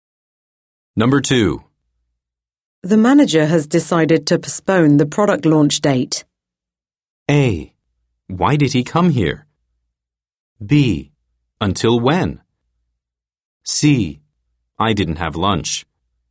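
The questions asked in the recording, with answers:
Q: The manager has decided to postpone the product launch date.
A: B: Until when?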